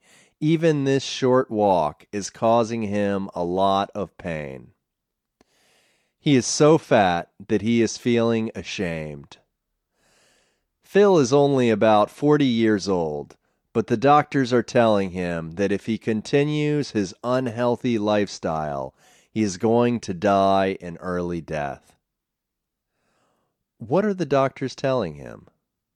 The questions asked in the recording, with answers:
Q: What are the doctors telling him?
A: They are telling him that if he continues his unhealthy lifestyle, he is going to die an early death.